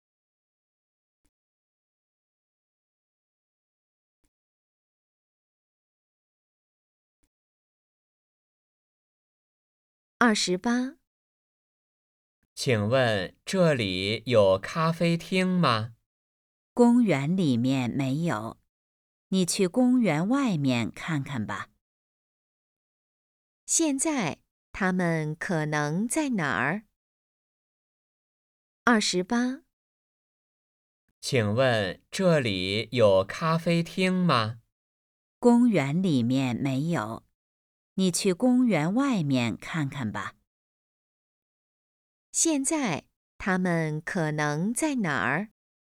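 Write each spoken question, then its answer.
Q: 现在他们可能在哪儿?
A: 公园里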